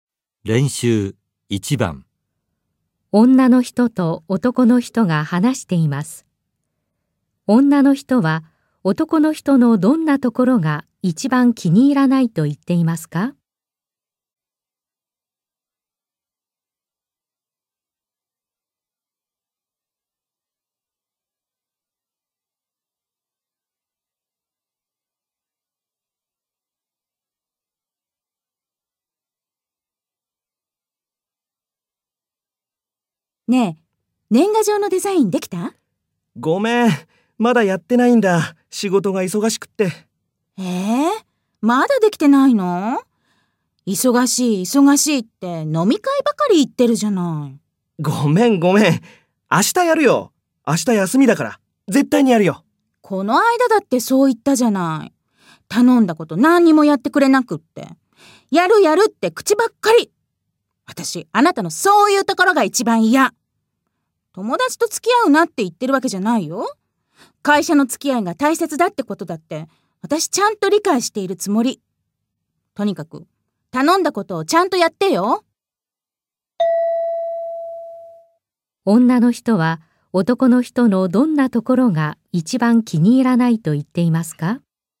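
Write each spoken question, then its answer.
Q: 女の人は男の人のどんなところが一番気に入らないと言っていますか?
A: やると言うだけで、頼んだことを何もやってくれないところ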